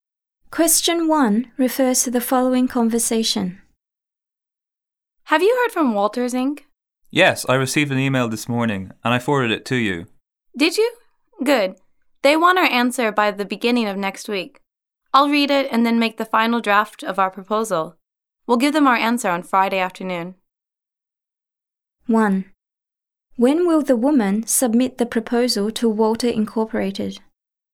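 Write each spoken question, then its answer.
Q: When will the woman submit the proposal to Walter Incorporated?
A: On Friday afternoon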